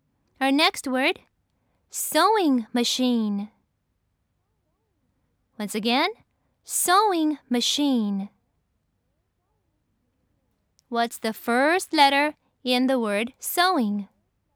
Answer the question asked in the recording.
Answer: That's right. It's S.